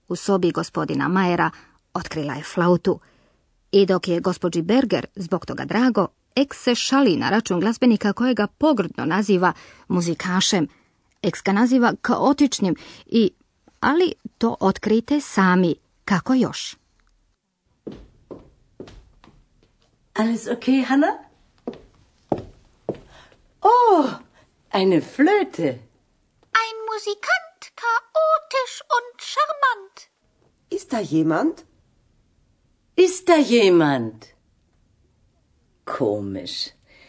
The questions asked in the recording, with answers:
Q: Ex ga naziva kaotičnim i...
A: Glazbenika Ex naziva i šarmantnim, šarmant.